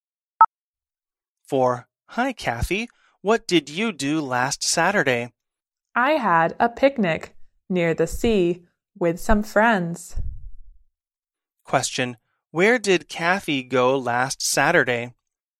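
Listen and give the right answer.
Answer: Near the sea, for a picnic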